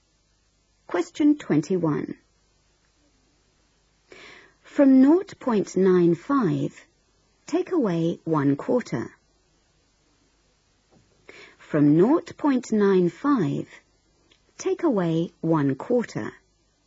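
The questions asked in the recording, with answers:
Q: From 0.95, take away 1/4.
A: 0.7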